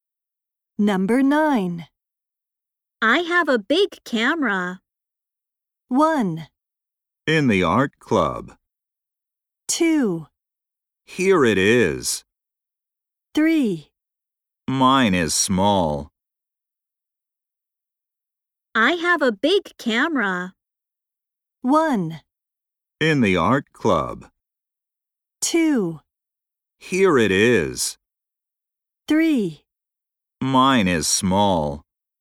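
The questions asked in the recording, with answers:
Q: I have a big camera.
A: 3: Mine is small.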